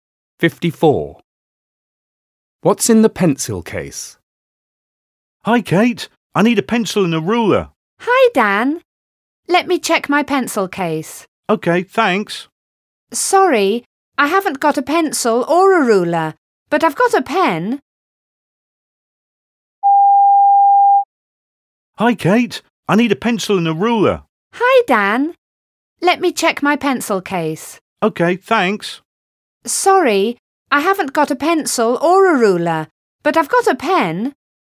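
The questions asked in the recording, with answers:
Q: What's in the pencil case?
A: A pen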